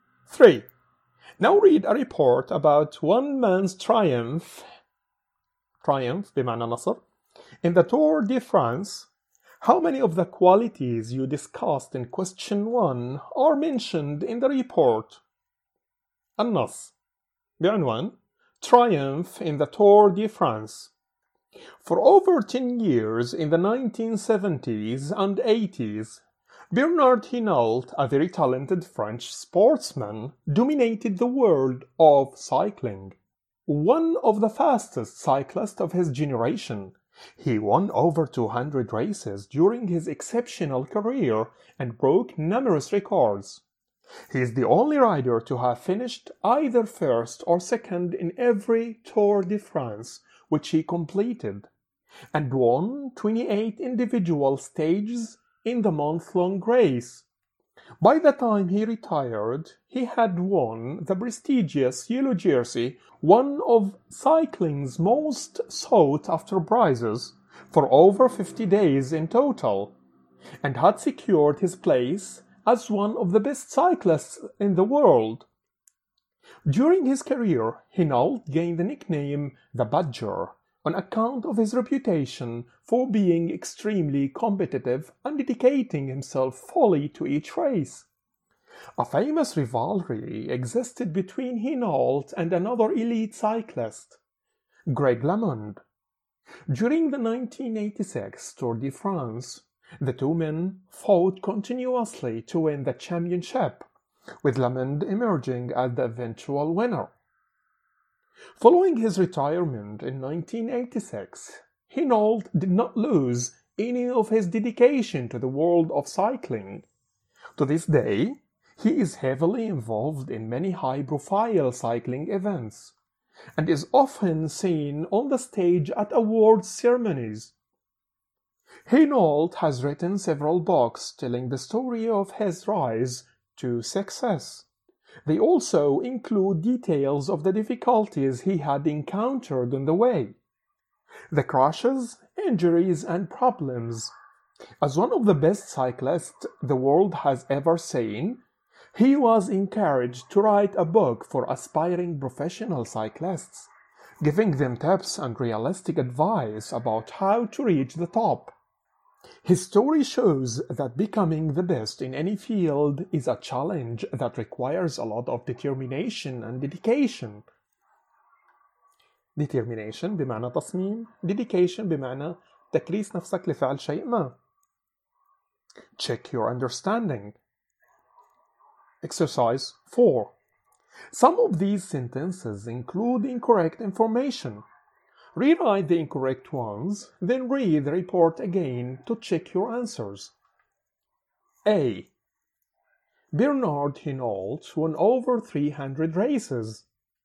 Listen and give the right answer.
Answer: التصحيح جملة خاطئة. False.